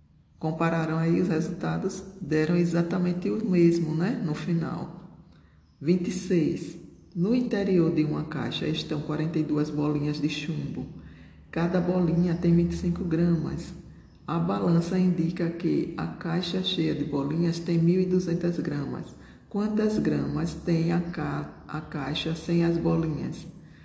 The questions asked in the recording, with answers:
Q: Quantas gramas tem a, ca a caixa sem as bolinhas?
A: Então, a caixa sem as bolinhas tem 150 gramas.